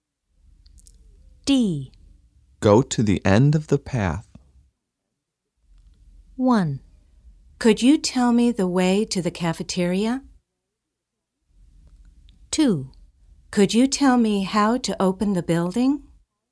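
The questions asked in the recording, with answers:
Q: Go to the end of the path.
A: 1: Could you tell me the way to the cafeteria?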